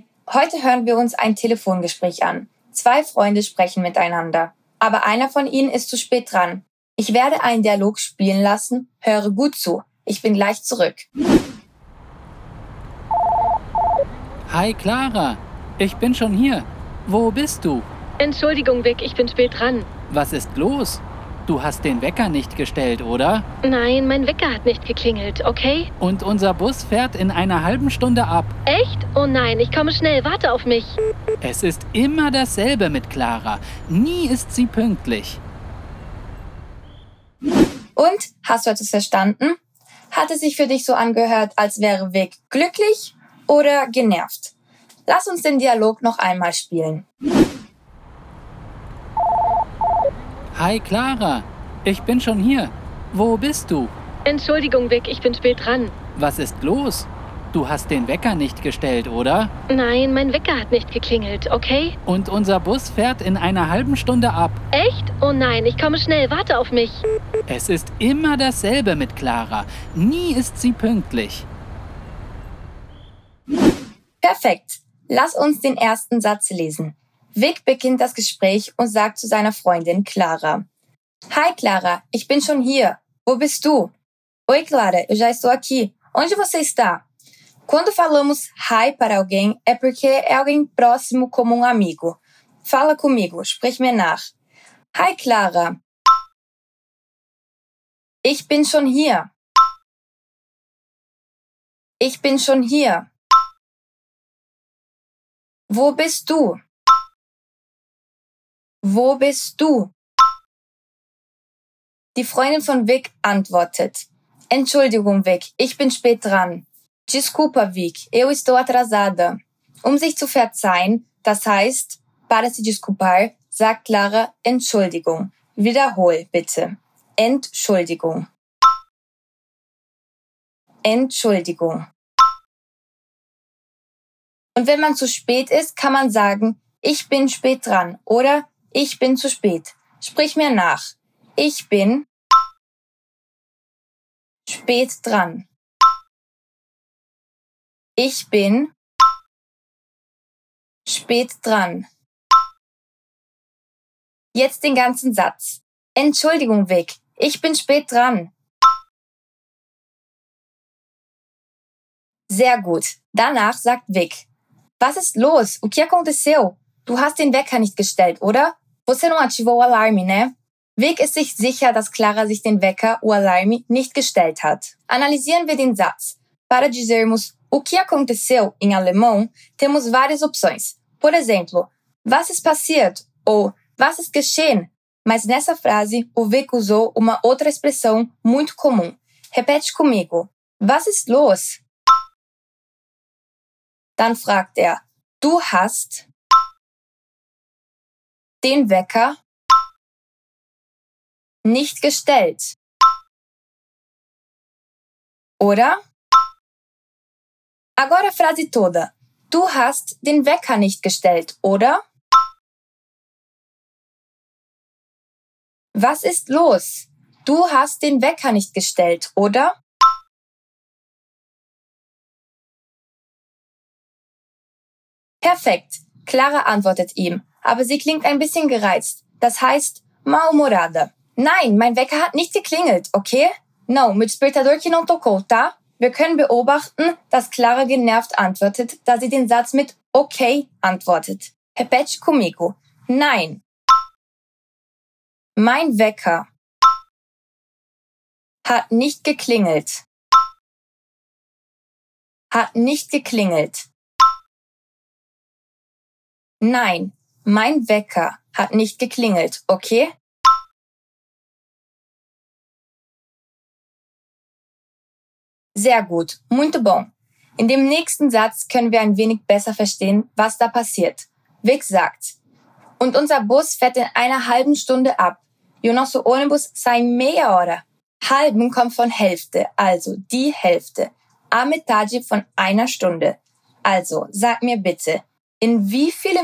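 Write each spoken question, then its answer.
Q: Hat es sich für dich so angehört, als wäre Vic glücklich oder genervt?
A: genervt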